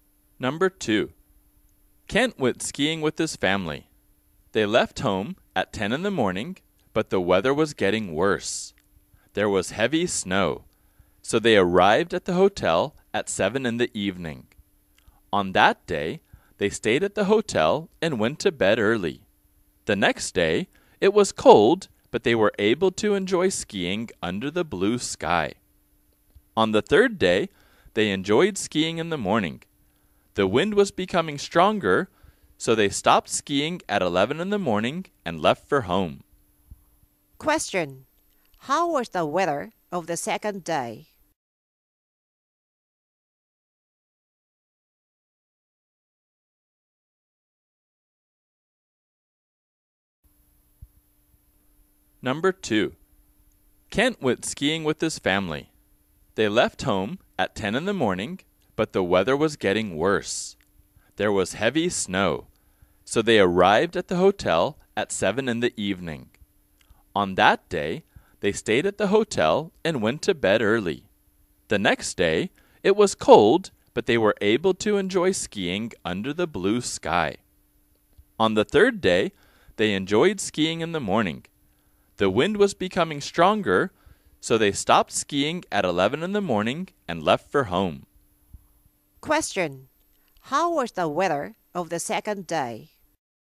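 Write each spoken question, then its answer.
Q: how was the weather of the second day?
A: It was cold but clear (blue sky).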